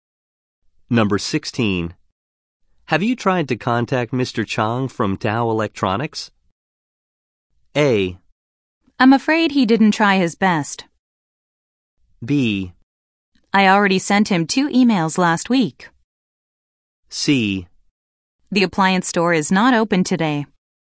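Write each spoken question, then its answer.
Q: Have you tried to contact Mr.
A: B: I already sent him 2 emails last week.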